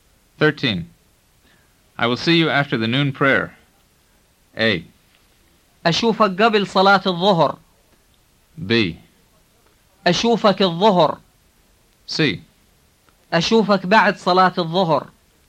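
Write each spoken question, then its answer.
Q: I will see you after the noon prayer.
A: C: أشوفك بعد صلاة الظهر.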